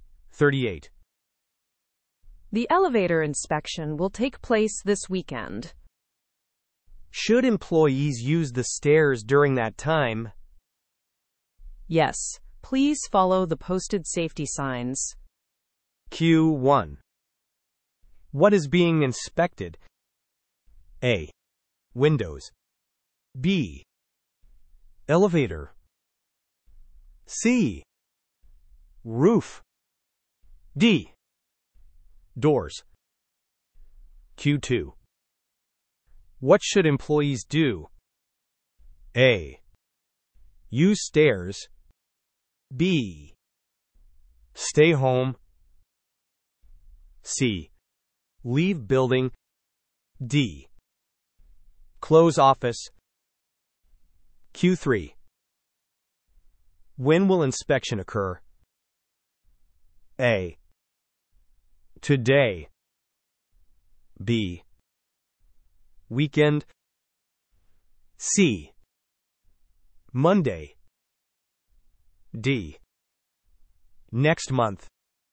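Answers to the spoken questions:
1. B: Elevator.
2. A: Use stairs.
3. B: Weekend.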